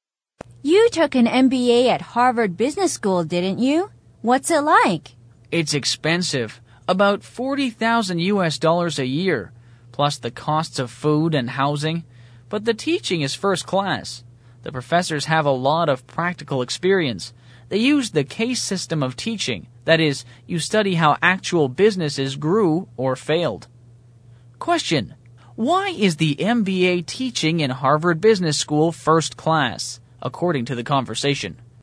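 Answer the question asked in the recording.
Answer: The professors have a lot of practical experience and use the case system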